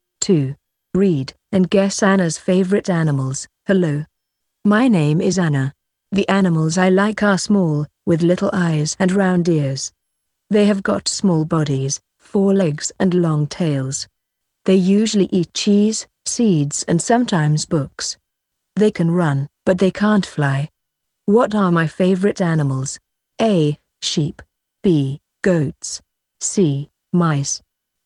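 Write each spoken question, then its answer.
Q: What are my favorite animals?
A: C: Mice.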